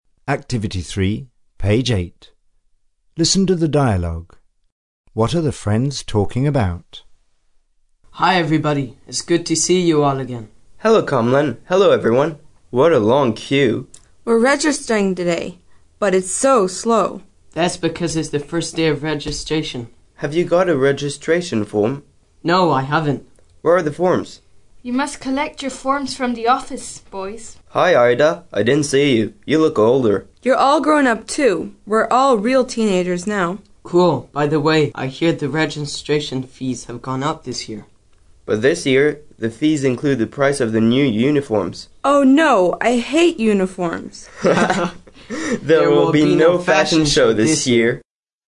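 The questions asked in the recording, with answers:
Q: What are the friends talking about?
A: Registering at school (registration forms, fees and uniforms)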